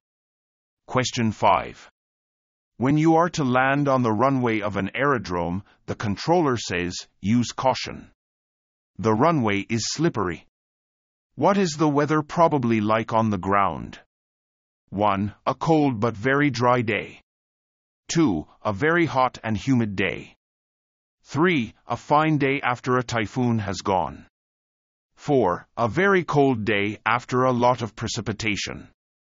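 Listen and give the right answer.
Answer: 4: A very cold day after a lot of precipitation.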